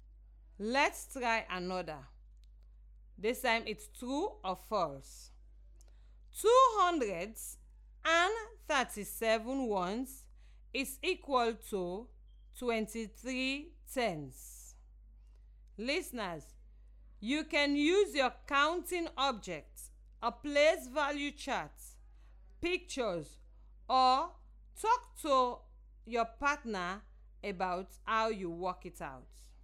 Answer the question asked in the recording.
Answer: I think the answer is false.